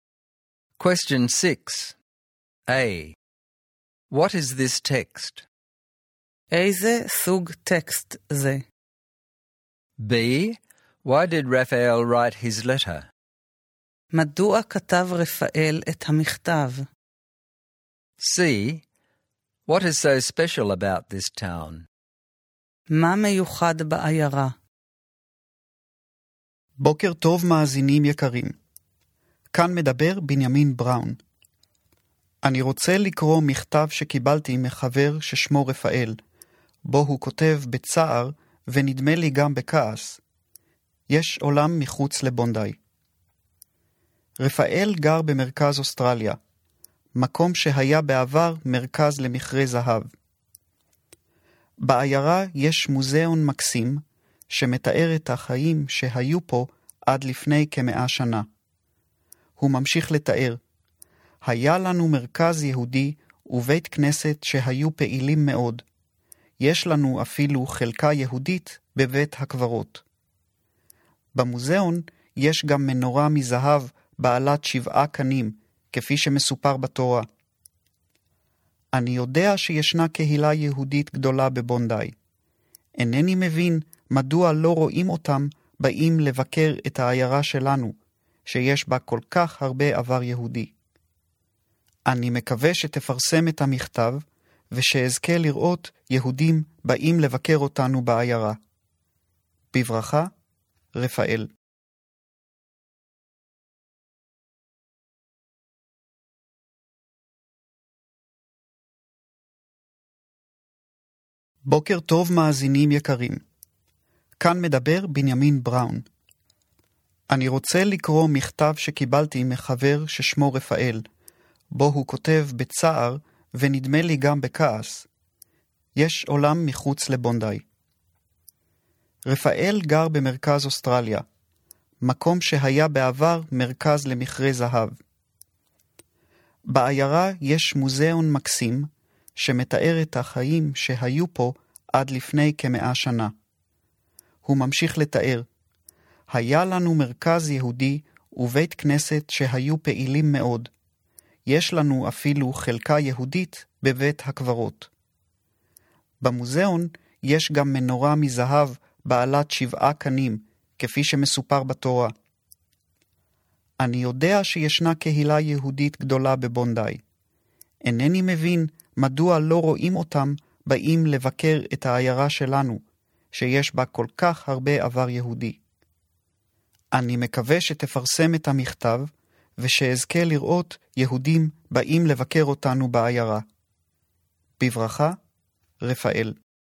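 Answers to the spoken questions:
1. A letter read aloud on a radio program
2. He is upset that Jews from Bondi don't visit his town, and he wants them to come.
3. It was a gold-mining town with a rich Jewish past: a Jewish centre and synagogue, a Jewish section of the cemetery, and a gold seven-branched menorah in its museum.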